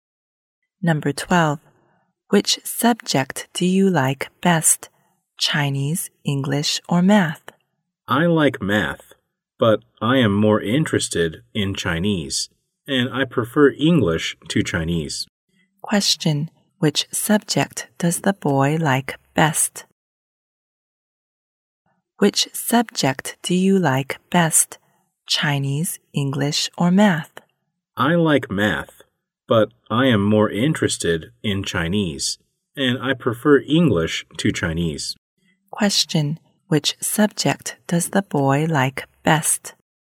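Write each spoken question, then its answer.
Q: Which subject does the boy like best?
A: English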